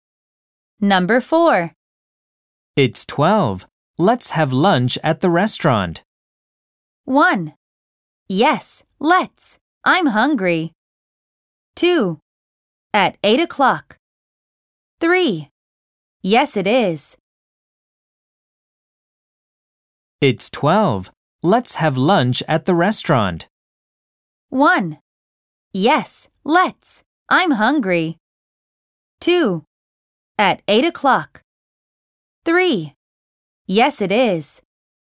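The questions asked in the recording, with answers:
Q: It's 12. Let's have lunch at the restaurant.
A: 1: Yes, let's. I'm hungry.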